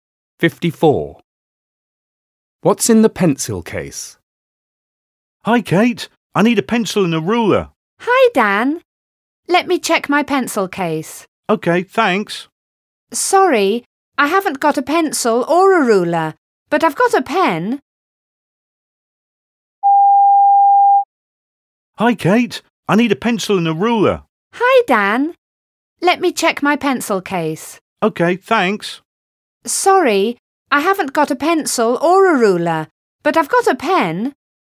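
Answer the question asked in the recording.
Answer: A pen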